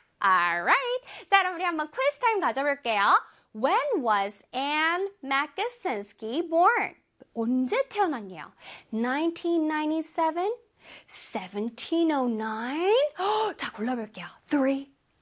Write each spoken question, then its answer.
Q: When was Anne Makosinski born?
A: 1997. 바로 1997년도에 태어났다고 하죠.